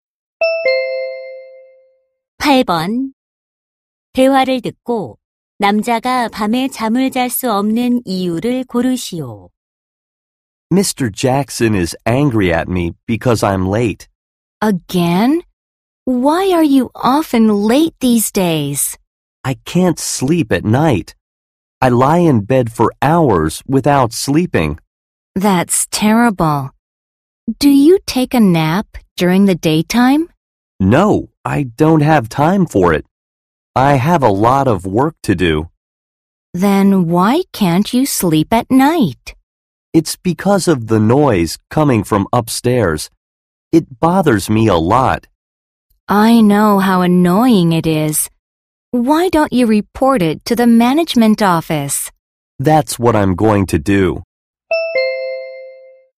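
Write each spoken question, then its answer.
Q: 대화를 듣고 남자가 밤에 잠을 잘 수 없는 이유를 고르시오.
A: 위층 소음 때문에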